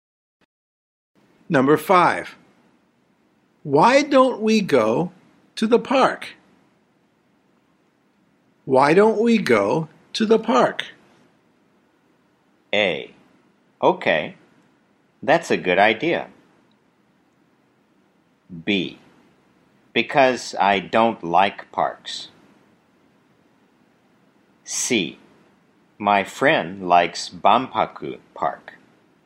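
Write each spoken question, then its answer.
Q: Why don't we go to the park?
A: A: Okay, that's a good idea.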